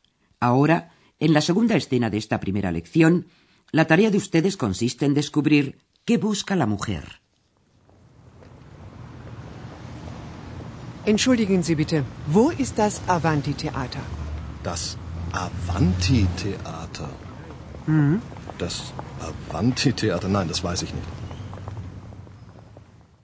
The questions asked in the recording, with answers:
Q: la tarea de ustedes consiste en descubrir qué busca la mujer.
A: la mujer estaba buscando un teatro, theater, un teatro determinado